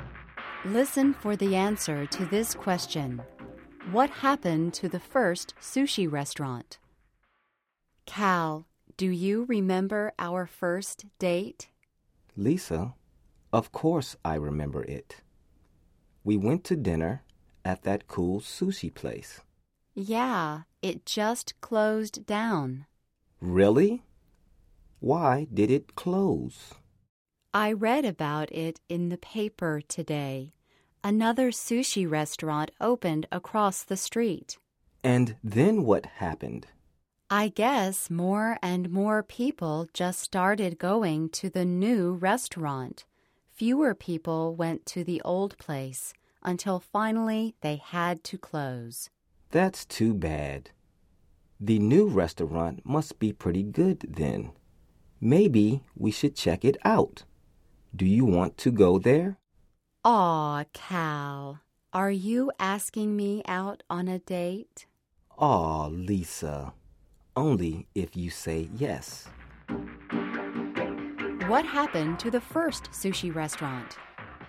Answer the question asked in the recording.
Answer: It closed.